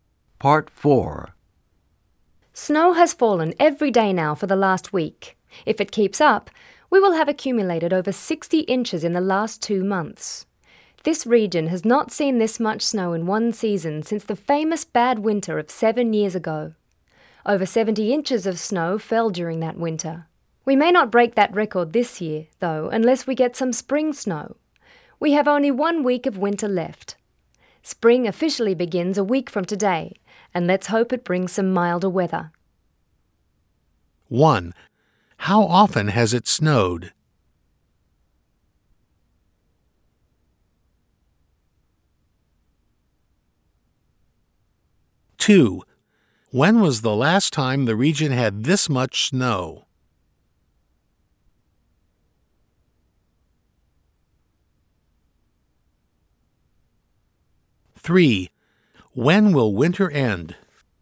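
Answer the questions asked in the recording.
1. Every day for the last week
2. 7 years ago
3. In one week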